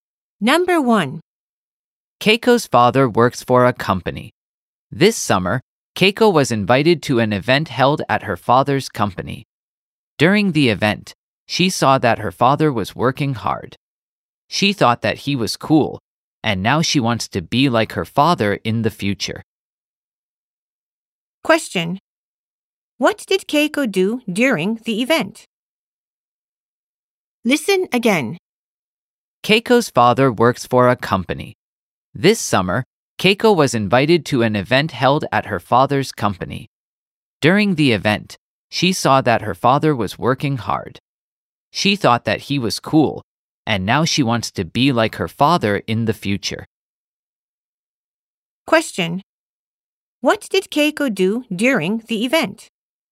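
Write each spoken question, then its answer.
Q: What did Keiko do during the event?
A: She saw her father working hard.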